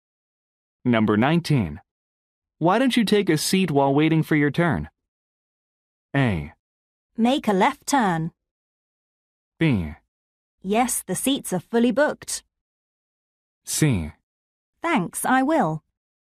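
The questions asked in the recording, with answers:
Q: Why don't you take a seat while waiting for your turn?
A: C: Thanks, I will.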